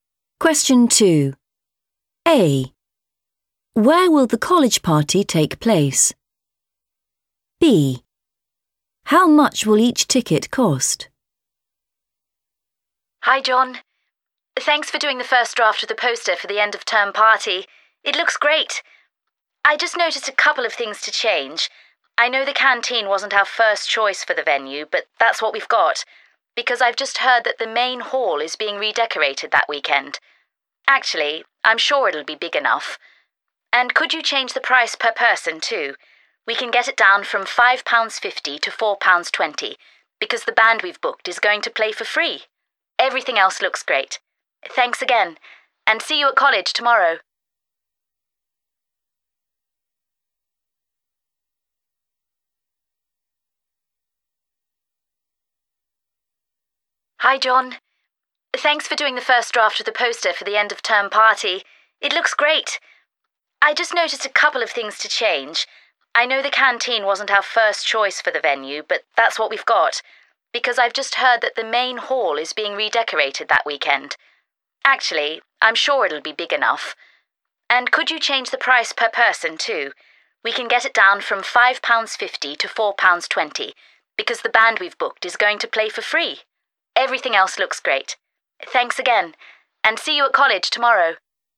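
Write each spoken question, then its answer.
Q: Where will the college party take place?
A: the canteen

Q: How much will each ticket cost?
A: £4.20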